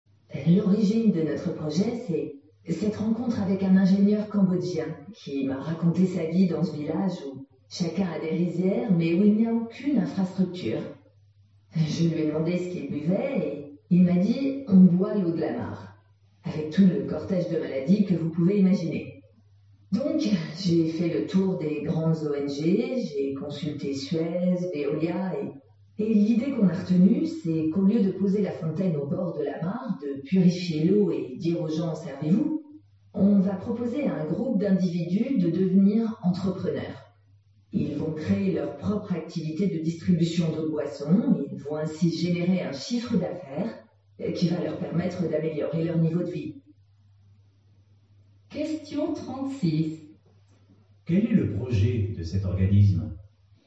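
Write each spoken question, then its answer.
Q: Quel est le projet de cet organisme ?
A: Aider des villageois cambodgiens à devenir entrepreneurs en créant leur propre activité de distribution d'eau potable.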